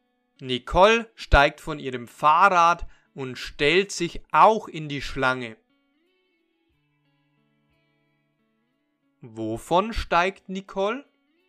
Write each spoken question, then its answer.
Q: steigt Nicole?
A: Von ihrem Fahrrad. Sie steigt von ihrem Fahrrad.